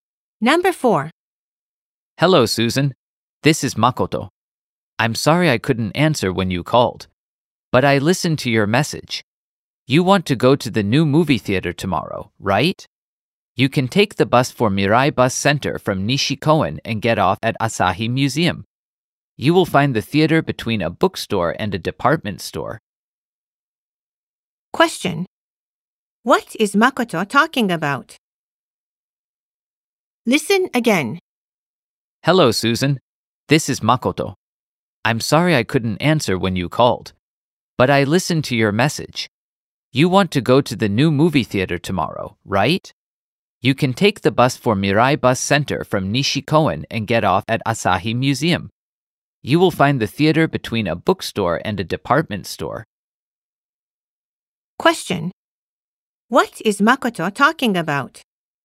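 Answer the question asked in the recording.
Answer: How to get to the new movie theater.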